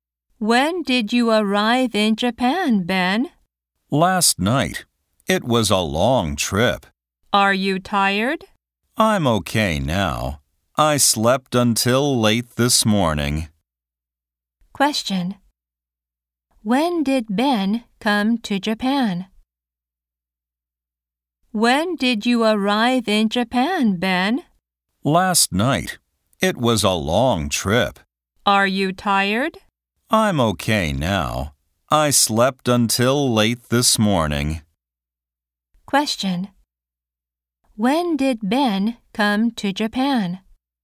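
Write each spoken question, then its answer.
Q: When did Ben come to Japan?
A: Last night.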